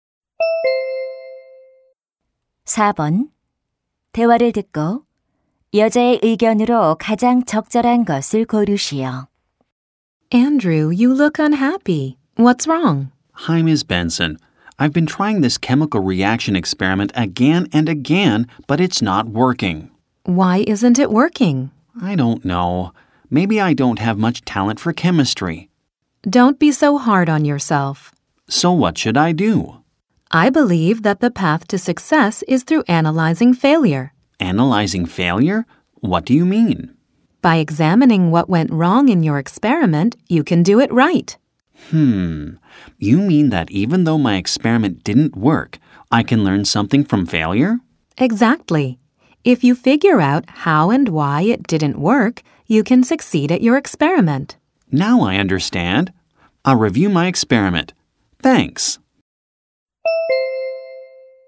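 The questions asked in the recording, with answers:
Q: 대화를 듣고 여자의 의견으로 가장 적절한 것을 고르시오.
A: 실패를 분석하는 것이 성공으로 가는 길이다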